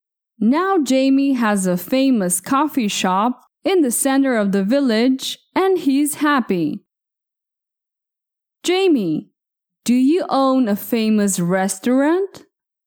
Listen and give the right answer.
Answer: No, I don't own a famous restaurant.